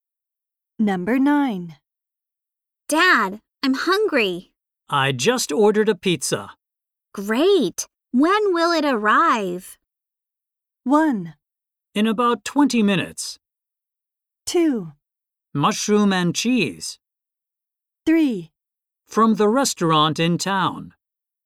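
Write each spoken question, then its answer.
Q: Great. When will it arrive?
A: 1: In about 20 minutes.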